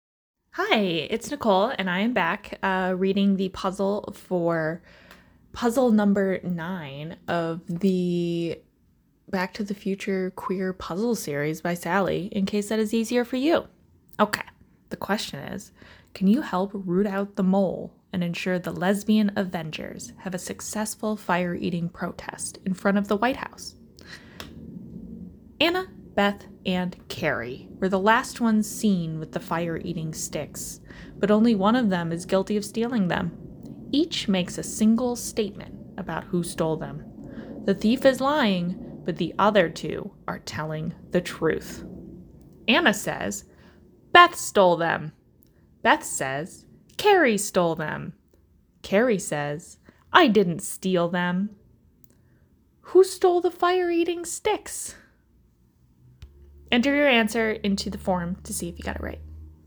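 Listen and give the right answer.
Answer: Beth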